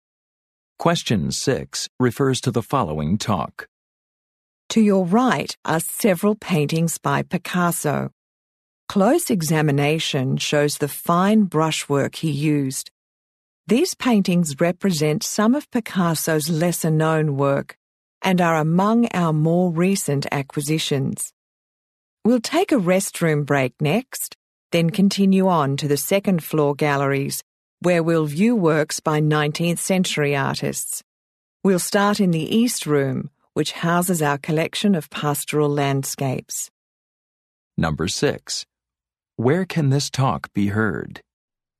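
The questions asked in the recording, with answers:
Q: Where can this talk be heard?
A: In an art museum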